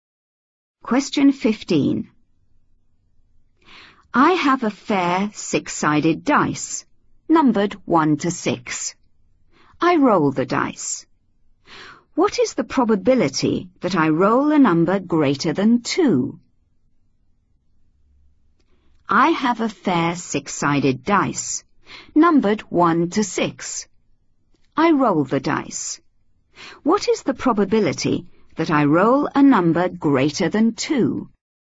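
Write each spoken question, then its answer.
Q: I roll the dice. What is the probability that I roll a number greater than 2?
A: 2/3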